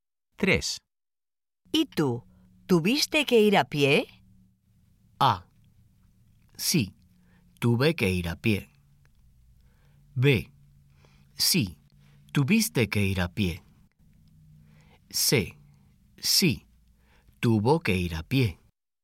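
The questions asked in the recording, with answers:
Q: ¿Y tú? ¿Tuviste que ir a pie?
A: A: Sí, tuve que ir a pie.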